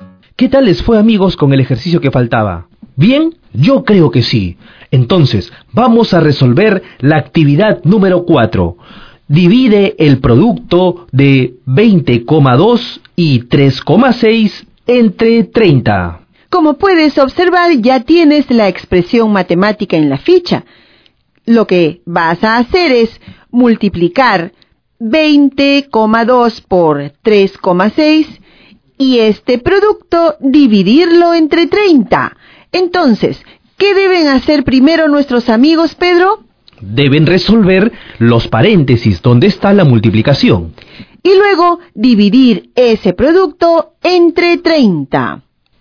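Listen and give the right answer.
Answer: 2,424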